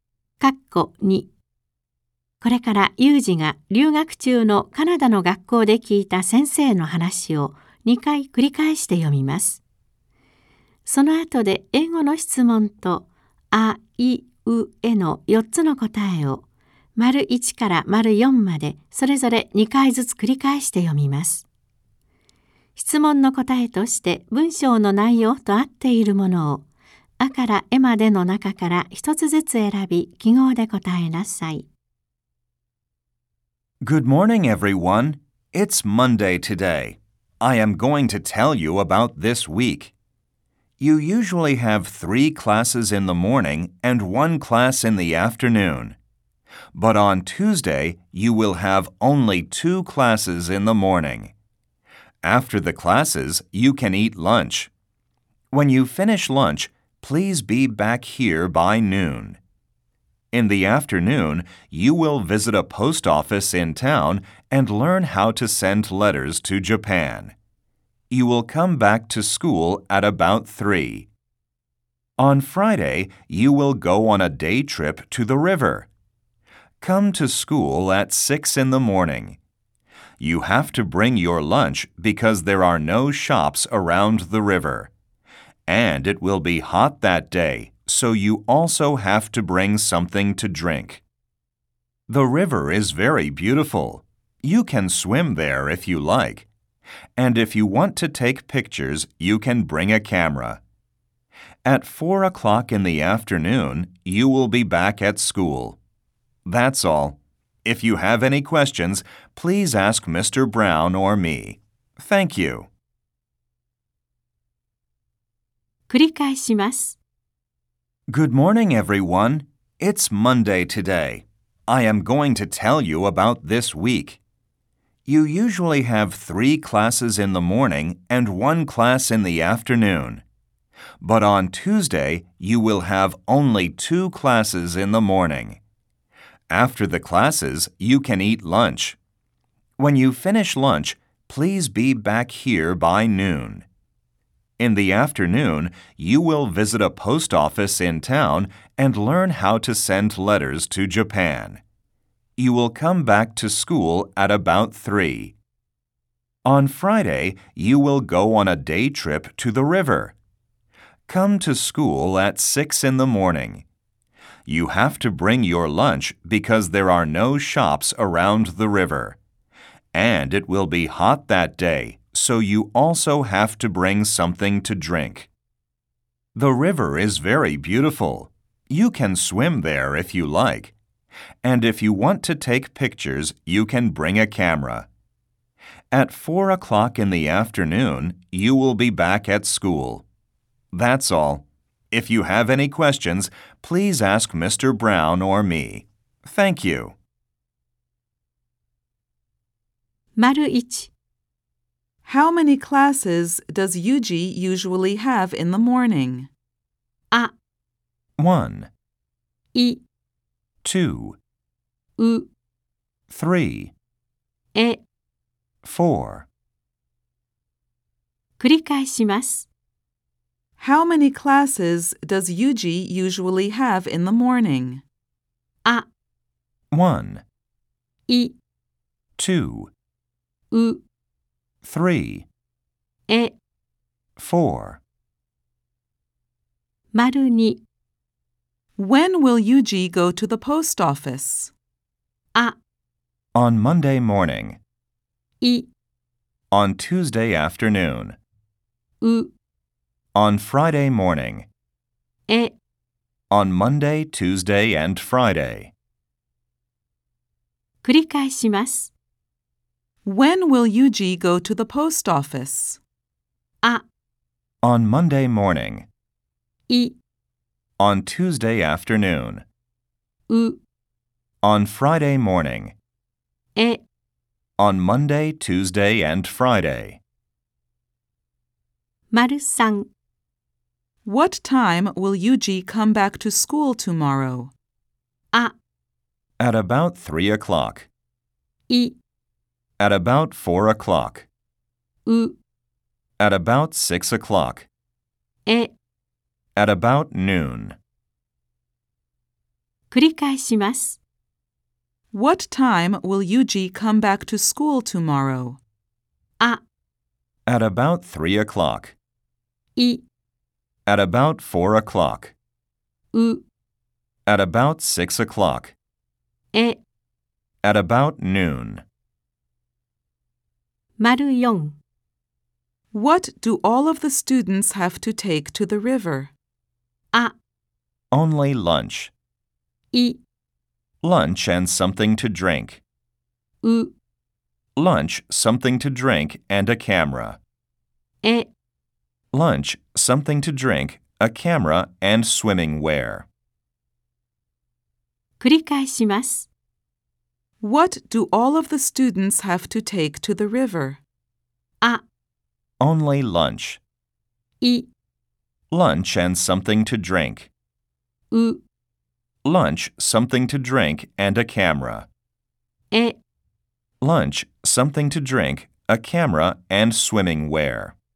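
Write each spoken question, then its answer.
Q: How many classes does Yuji usually have in the morning?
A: う: 3

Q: When will Yuji go to the post office?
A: い: On Tuesday afternoon.

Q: What time will Yuji come back to school tomorrow?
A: あ: At about 3 o'clock.

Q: What do all of the students have to take to the river?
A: い: Lunch and something to drink.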